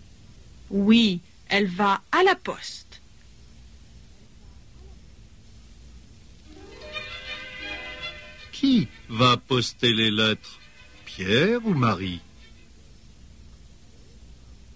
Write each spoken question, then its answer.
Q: Qui va poster les lettres? Pierre ou Marie?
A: C'est Marie qui va poster les lettres.